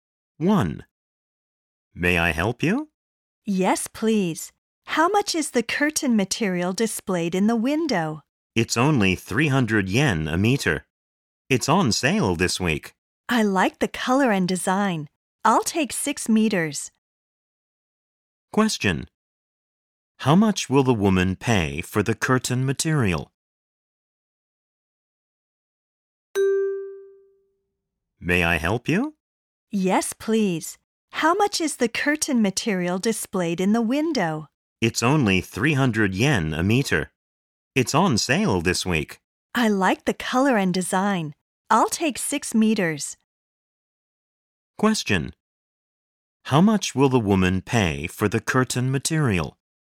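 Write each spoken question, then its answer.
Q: How much will the woman pay for the curtain material?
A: 1,800 yen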